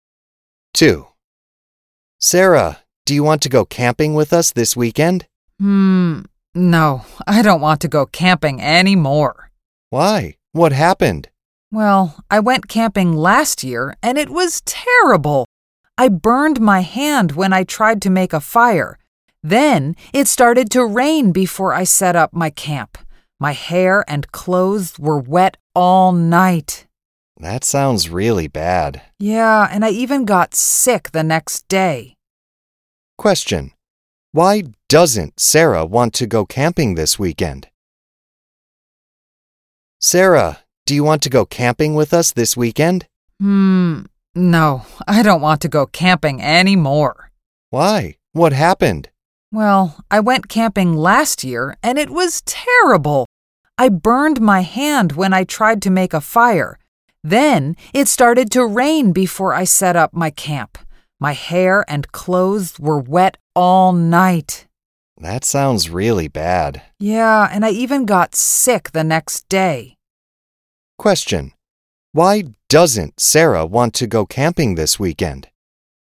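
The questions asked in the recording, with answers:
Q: Question, why doesn't Sarah want to go camping this weekend?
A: Her camping trip last year was terrible: she burned her hand, got wet in the rain and got sick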